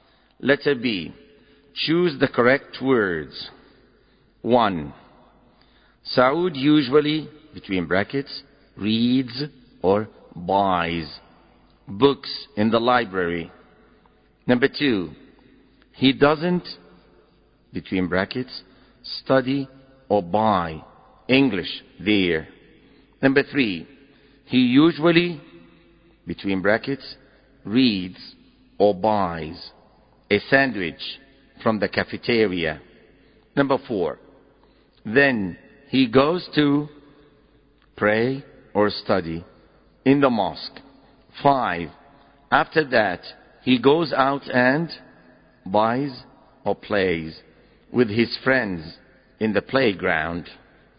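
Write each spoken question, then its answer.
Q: One, Saud usually, between brackets, reads or buys books in the library.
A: reads

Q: Number two, he doesn't, between brackets, study or buy English there.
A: study

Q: Number three, he usually, between brackets, reads or buys a sandwich from the cafeteria.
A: buys

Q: Number four, then he goes to pray or study in the mosque.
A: pray

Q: Five, after that, he goes out and buys or plays with his friends in the playground.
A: plays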